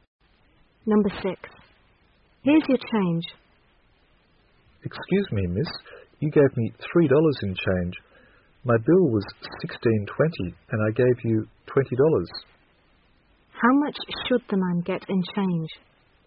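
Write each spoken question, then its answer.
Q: How much should the man get in change?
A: $3.80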